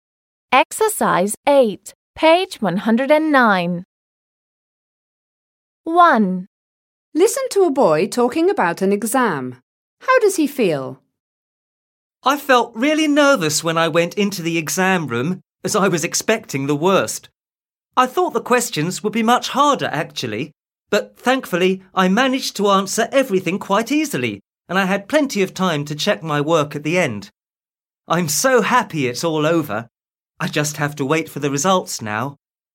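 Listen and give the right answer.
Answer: Relieved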